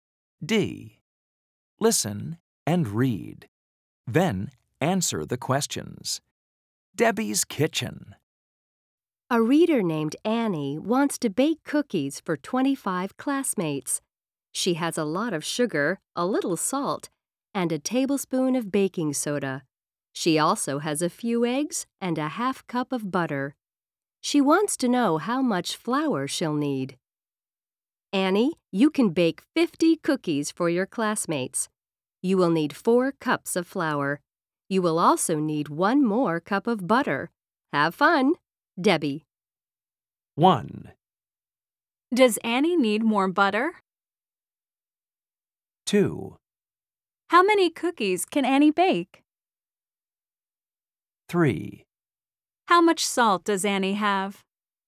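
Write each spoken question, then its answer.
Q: Does Annie need more butter?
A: Yes, she needs 1 more cup of butter.

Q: How many cookies can Annie bake?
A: 50 cookies

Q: How much salt does Annie have?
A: A little salt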